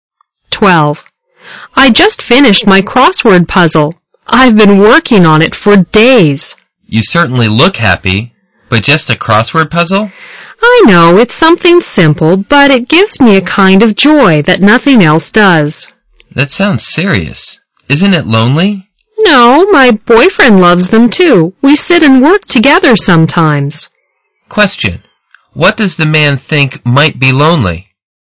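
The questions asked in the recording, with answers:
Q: What does the man think might be lonely?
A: Doing crossword puzzles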